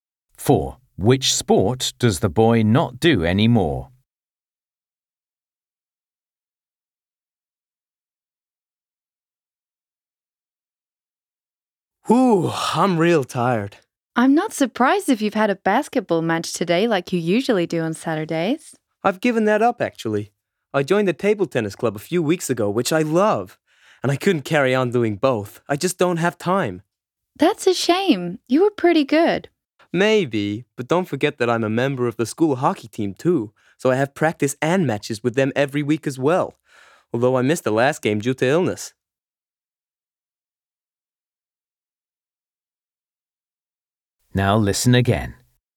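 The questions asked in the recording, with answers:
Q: Which sport does the boy not do anymore?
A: Basketball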